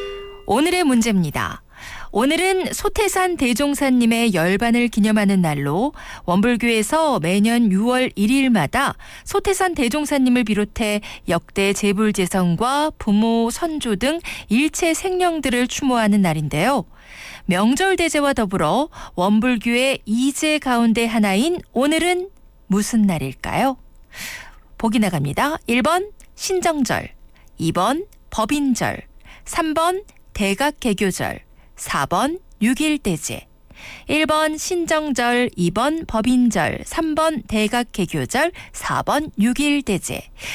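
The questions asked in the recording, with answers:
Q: 명절대제와 더불어 원불교의 이제 가운데 하나인 오늘은 무슨 날일까요?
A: 4: 6.1대제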